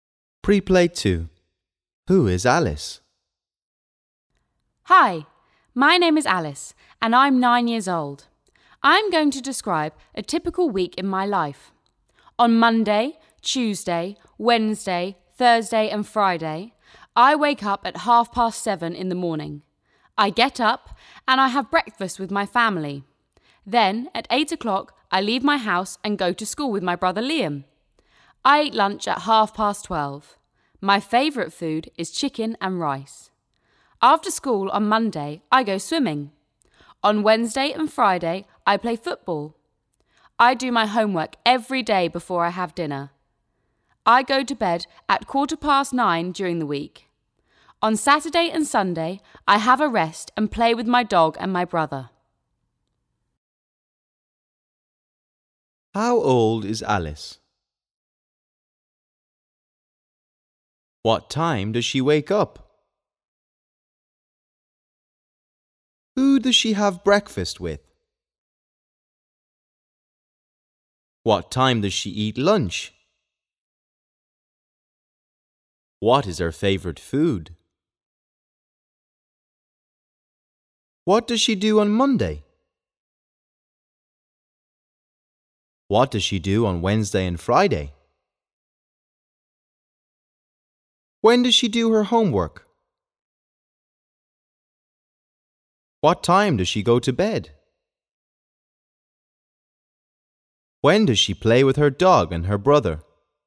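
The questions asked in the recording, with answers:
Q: How old is Alice?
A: 9 years old

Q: What time does she wake up?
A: 7:30 in the morning

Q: Who does she have breakfast with?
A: her family

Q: What time does she eat lunch?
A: 12:30

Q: What is her favorite food?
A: chicken and rice

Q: What does she do on Monday?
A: goes swimming after school

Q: What does she do on Wednesday and Friday?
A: plays football

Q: When does she do her homework?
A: every day before dinner

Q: What time does she go to bed?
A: 9:15 during the week

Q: When does she play with her dog and her brother?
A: on Saturday and Sunday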